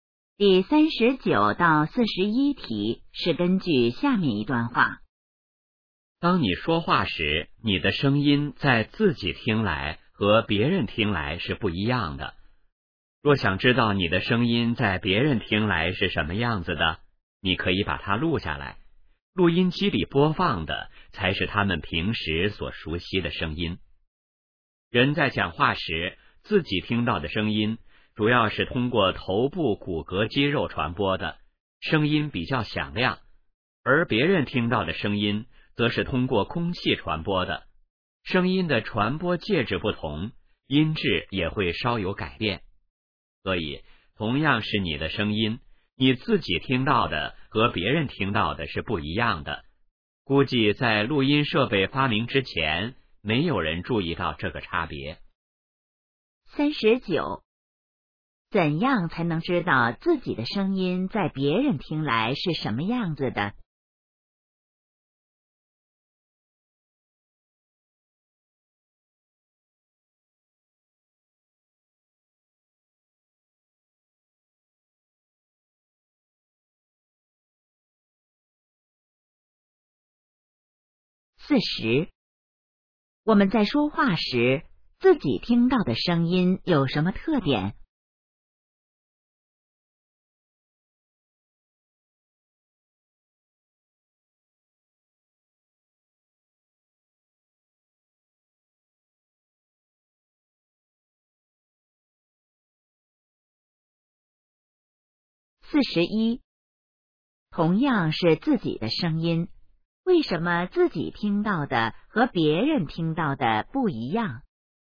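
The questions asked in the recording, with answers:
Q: 怎样才能知道自己的声音在别人听来是什么样子的?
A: 把它录下来

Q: 我们在说话时,自己听到的声音有什么特点?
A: 比较响亮

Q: 同样是自己的声音,为什么自己听到的和别人听到的不一样?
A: 声音的传播介质不同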